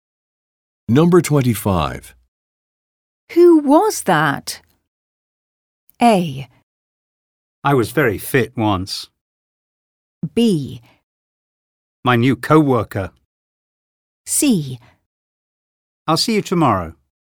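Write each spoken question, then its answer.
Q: Who was that?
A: B: My new co-worker.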